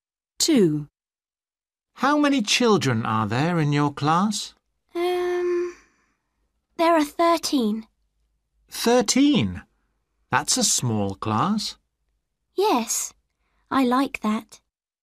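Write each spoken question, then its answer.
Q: How many children are there in your class?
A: 13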